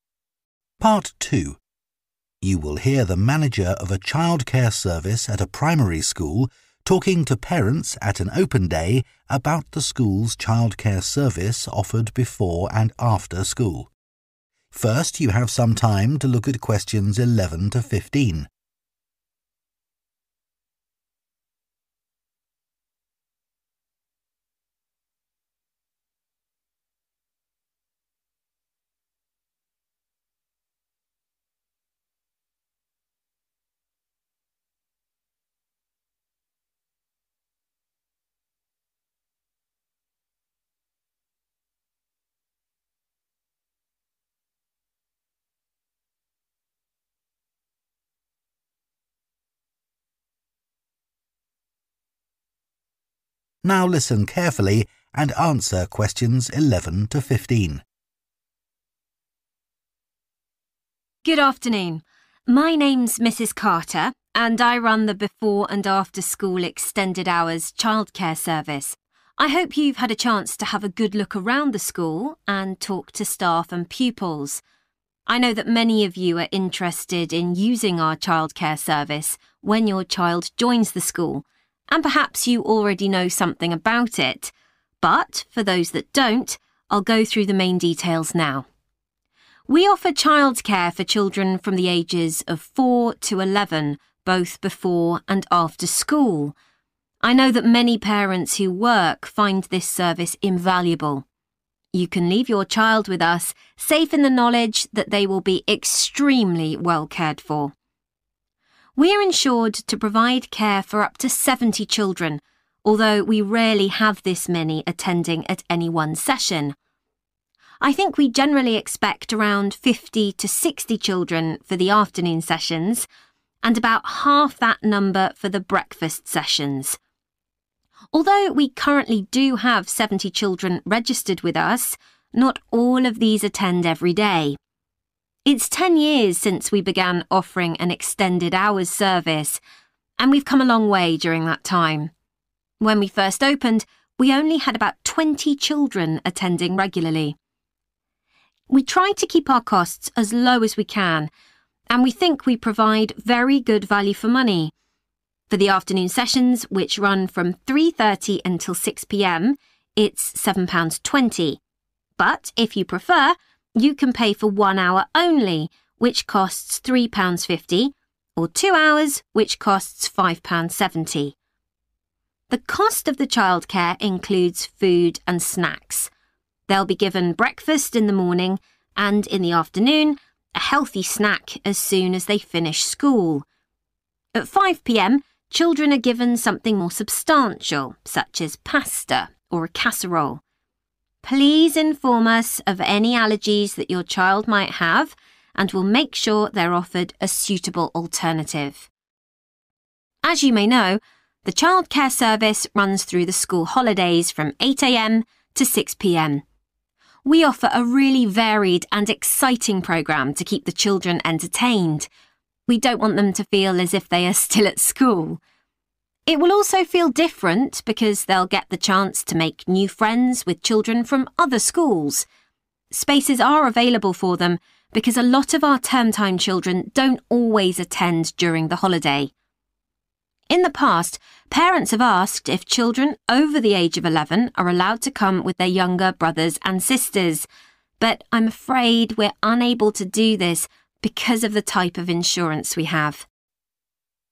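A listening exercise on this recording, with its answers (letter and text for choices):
Choose TWO letters. A-E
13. How much does childcare cost for a complete afternoon session per child?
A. £3.50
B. £5.70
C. £7.20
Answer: C. £7.20

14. What does the manager say about food?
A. Children with allergies should bring their own food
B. Children may bring healthy snacks with them.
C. Children are given a proper meal at 5 p.m.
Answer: C. Children are given a proper meal at 5 p.m.

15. What is different about arrangements in the school holidays?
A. Children from other schools can attend.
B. Older children can attend.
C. A greater number of children can attend.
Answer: A. Children from other schools can attend.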